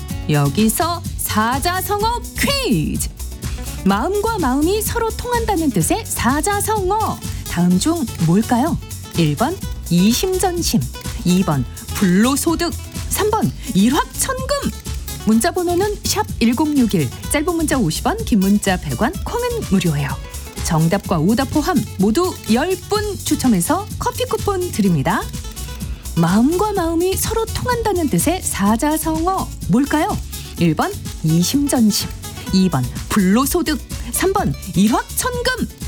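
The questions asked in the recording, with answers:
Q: 마음과 마음이 서로 통한다는 뜻의 사자성어 뭘까요?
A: 1: 이심전심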